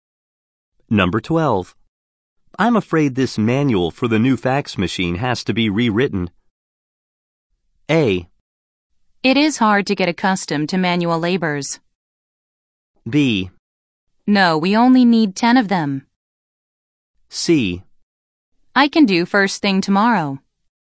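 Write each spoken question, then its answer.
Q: I'm afraid this manual for the new fax machine has to be rewritten.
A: C: I can do first thing tomorrow.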